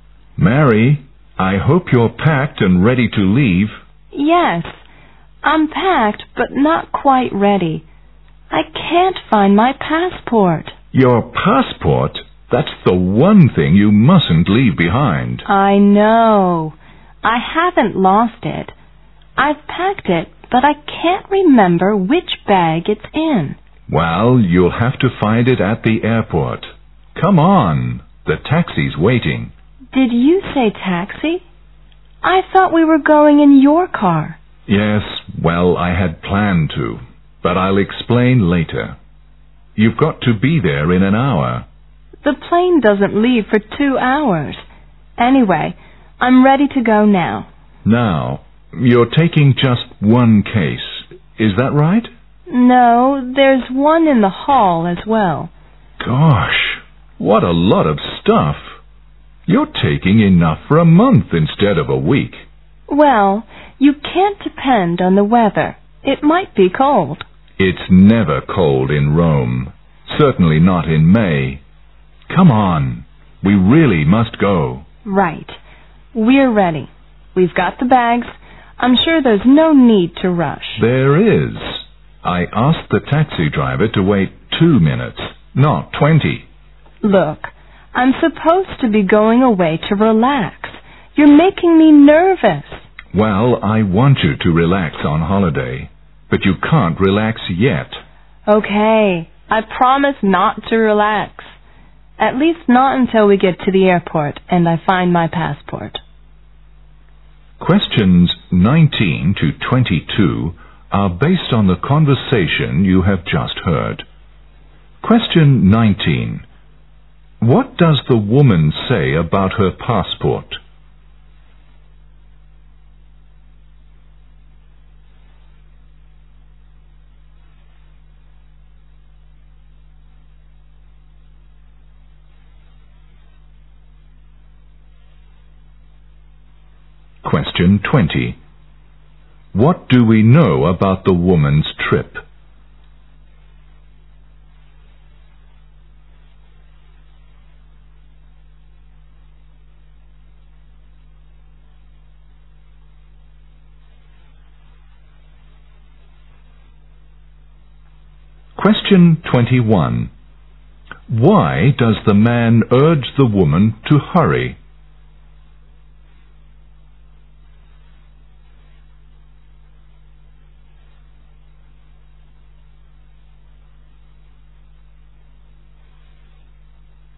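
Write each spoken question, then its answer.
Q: What does the woman say about her passport?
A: She packed it but can't remember which bag it's in

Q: What do we know about the woman's trip?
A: She is going to Rome for a week

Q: Why does the man urge the woman to hurry?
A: The taxi is waiting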